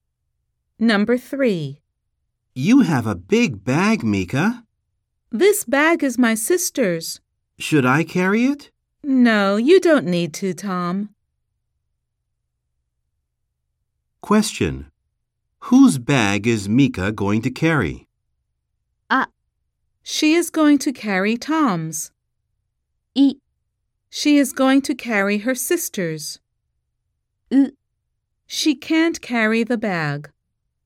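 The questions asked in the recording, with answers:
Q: Whose bag is Mika going to carry?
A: B: She is going to carry her sister's.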